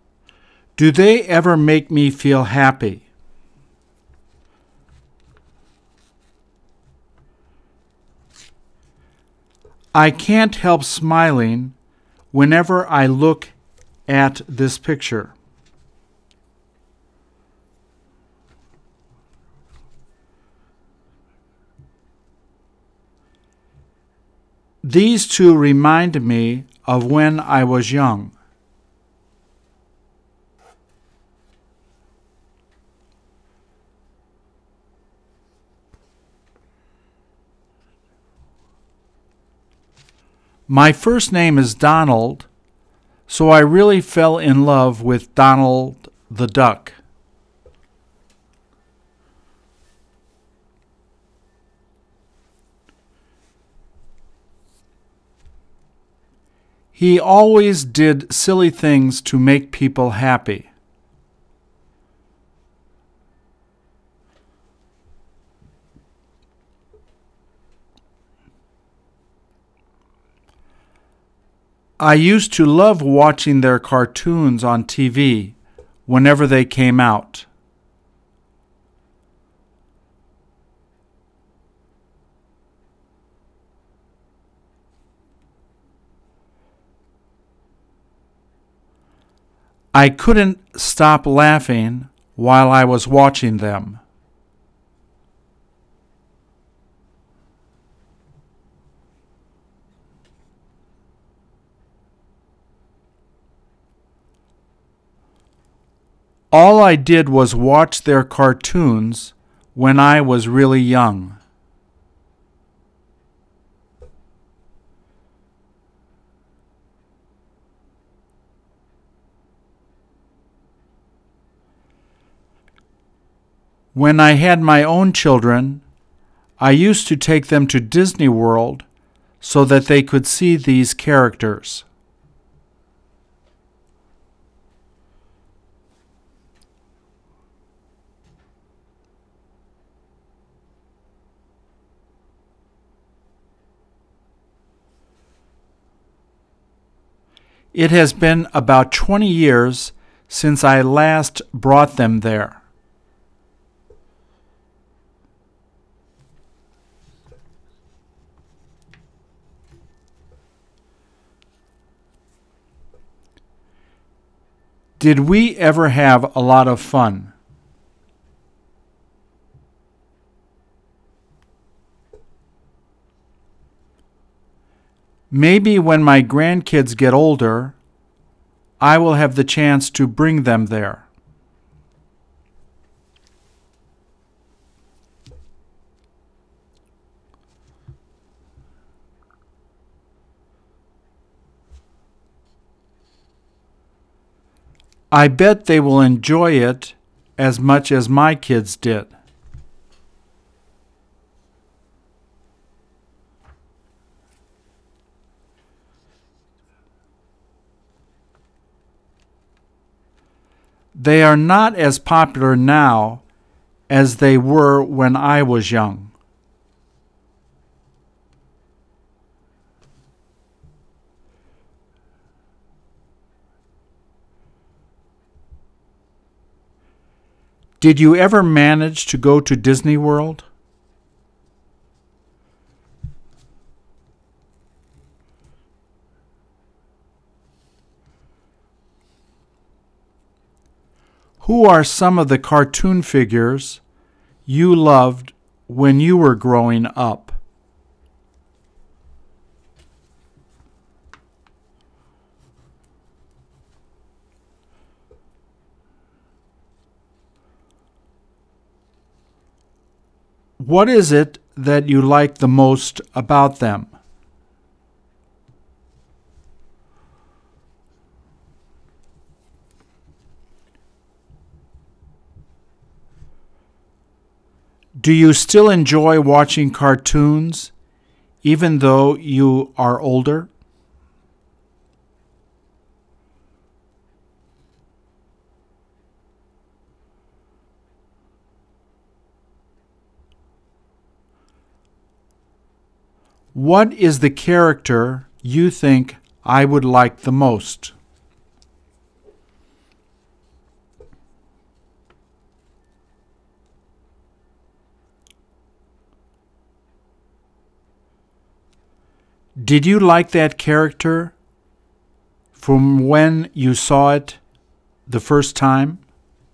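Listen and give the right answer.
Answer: Donald Duck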